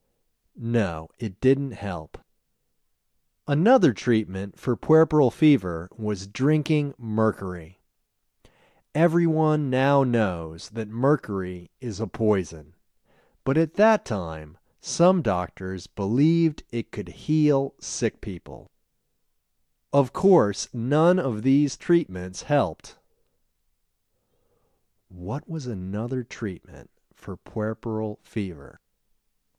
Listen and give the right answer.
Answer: Another treatment for puerperal fever was drinking mercury.